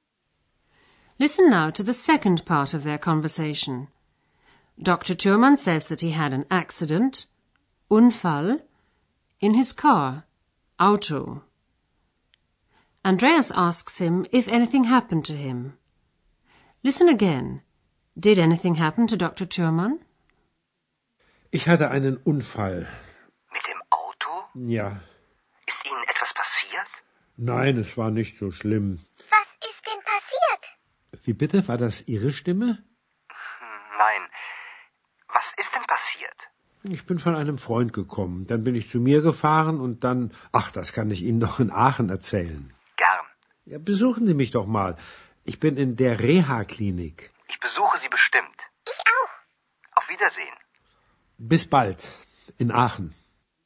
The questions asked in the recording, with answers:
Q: Did anything happen to Dr. Thürmann?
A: At least Dr. Thürmann wasn't seriously injured.